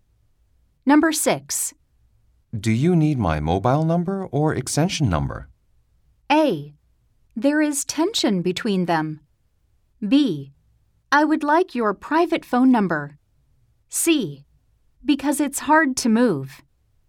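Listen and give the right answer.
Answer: B: I would like your private phone number.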